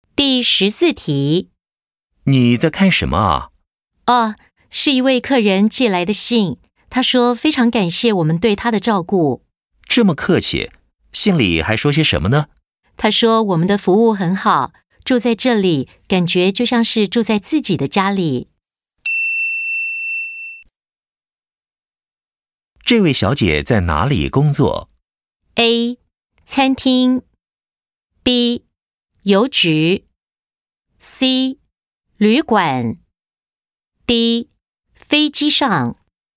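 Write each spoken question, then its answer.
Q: 这位小姐在哪里工作?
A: C: 旅馆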